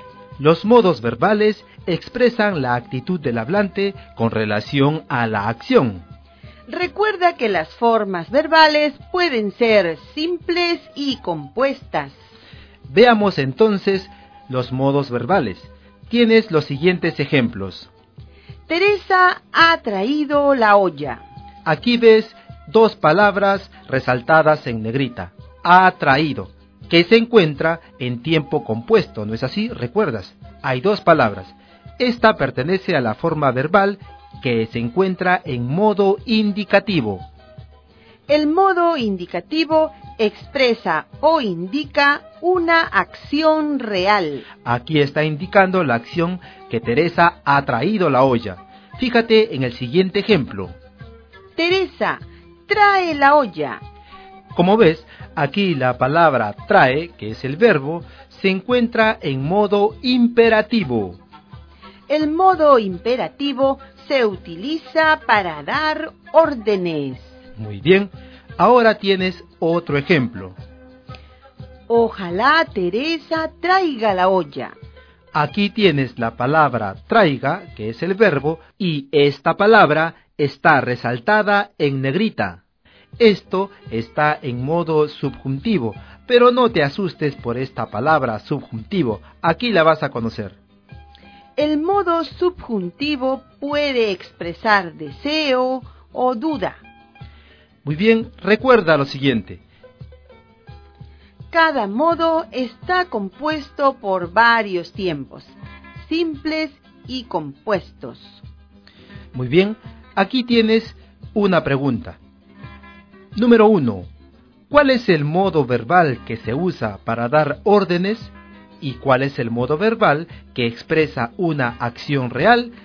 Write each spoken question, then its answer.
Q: ¿Cuál es el modo verbal que se usa para dar órdenes?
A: Y el imperativo se utiliza para dar órdenes.

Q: ¿Y cuál es el modo verbal que expresa una acción real?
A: El indicativo, recuerda, expresa o indica una acción real.